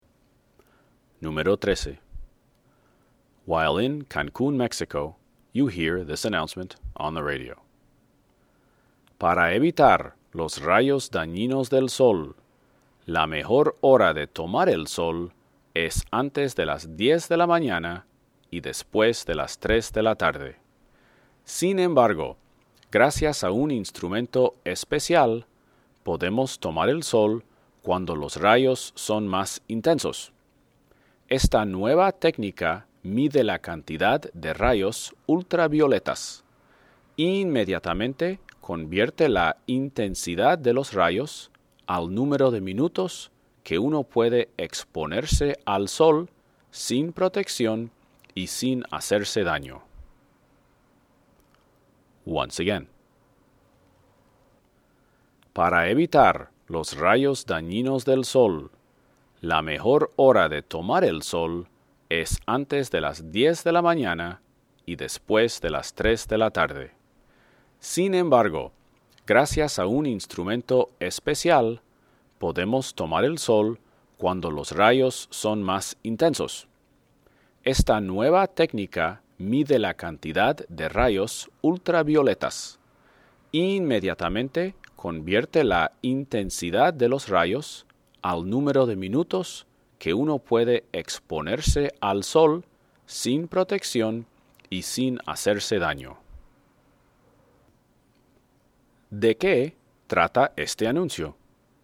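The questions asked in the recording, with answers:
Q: ¿De qué trata este anuncio?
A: De un instrumento que mide los rayos ultravioletas e indica cuántos minutos se puede tomar el sol sin protección y sin hacerse daño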